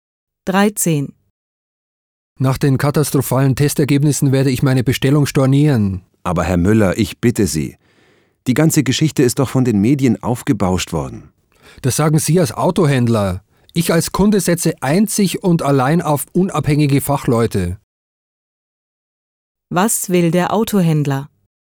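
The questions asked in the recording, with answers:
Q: Was will der Autohändler?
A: Er will Herrn Müller davon abbringen, seine Bestellung zu stornieren.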